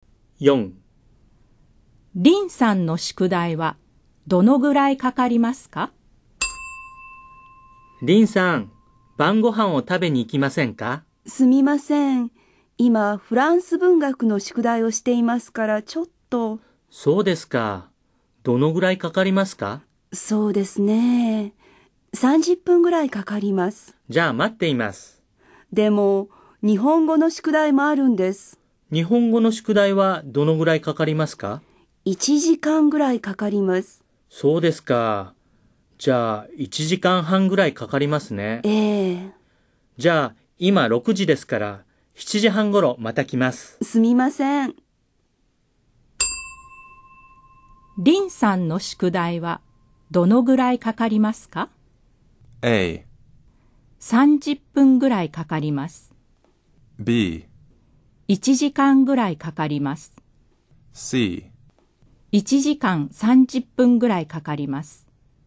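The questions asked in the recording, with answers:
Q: リンさんの宿題はどのぐらいかかりますか?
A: C: 1時間30分ぐらいかかります。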